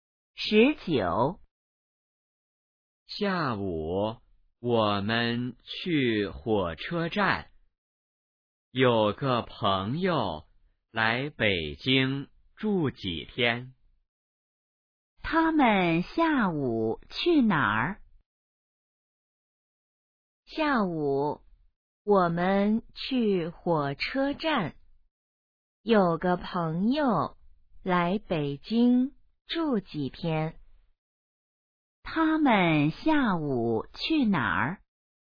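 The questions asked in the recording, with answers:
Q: 他们下午去哪儿?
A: 火车站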